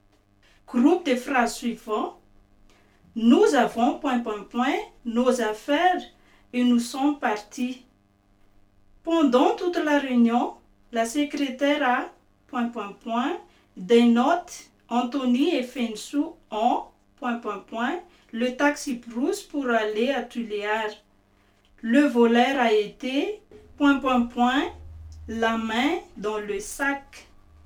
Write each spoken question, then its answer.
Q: Groupe de phrases suivantes.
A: Le mot qui manque alors, c'est le mot prix.